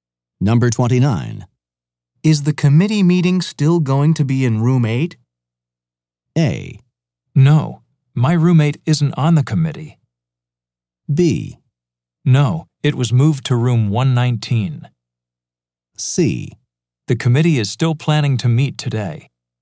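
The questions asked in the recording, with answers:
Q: Is the committee meeting still going to be in room 8?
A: B: No, it was moved to room 119.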